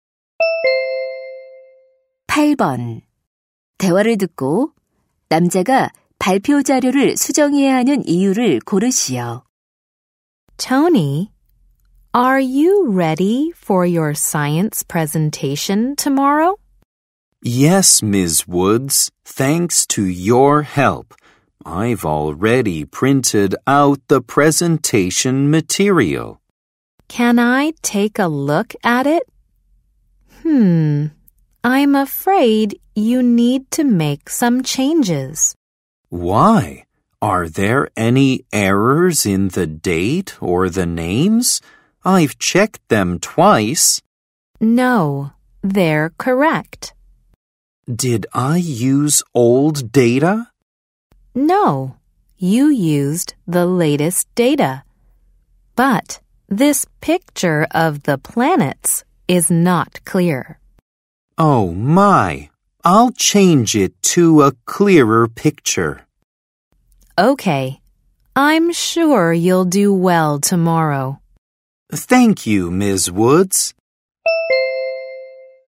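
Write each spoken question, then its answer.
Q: 대화를 듣고 남자가 발표 자료를 수정해야 하는 이유를 고르시오.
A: 행성 사진이 선명하지 않아서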